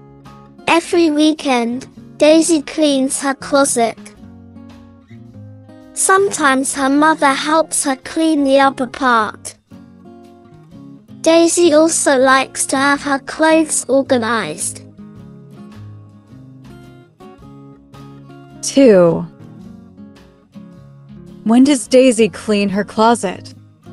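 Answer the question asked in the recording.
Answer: Every weekend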